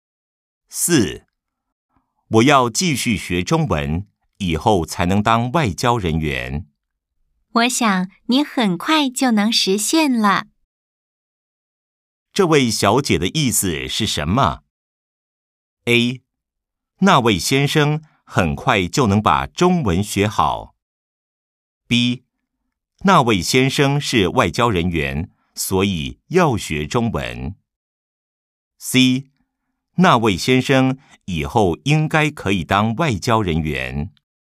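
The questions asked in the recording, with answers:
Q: 这位小姐的意思是什么?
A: C: 那位先生以后应该可以当外交人员。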